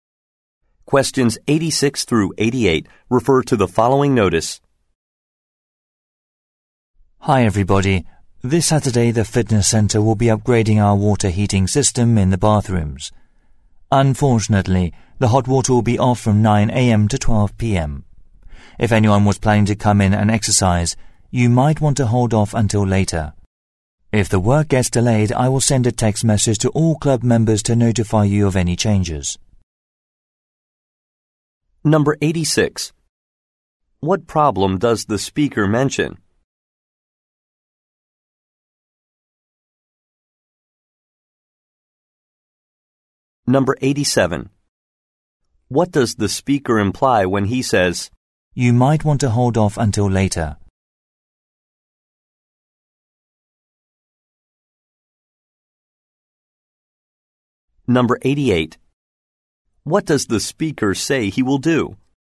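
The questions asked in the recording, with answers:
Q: What problem does the speaker mention?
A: The hot water will be off on Saturday from 9 a.m. to 12 p.m.

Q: What does the speaker say he will do?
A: Send a text message to members if the work is delayed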